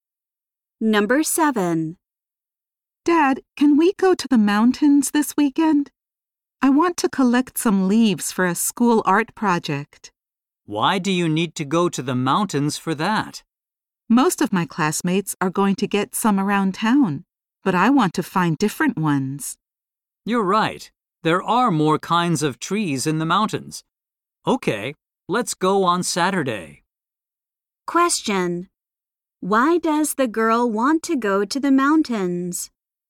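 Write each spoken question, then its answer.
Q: Why does the girl want to go to the mountains?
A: To find different kinds of leaves for her art project.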